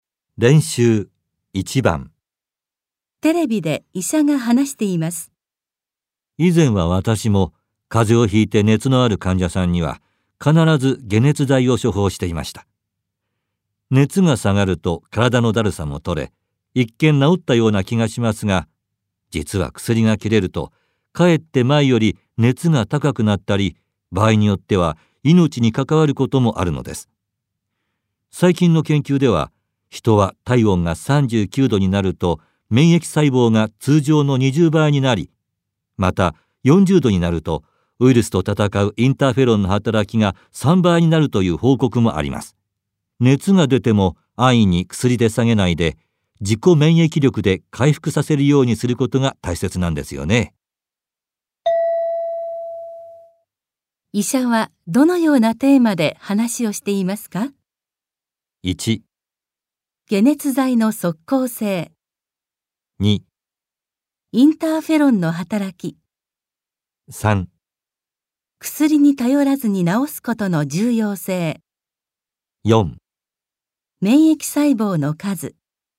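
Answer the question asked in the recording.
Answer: 3: 薬に頼らずに治すことの重要性。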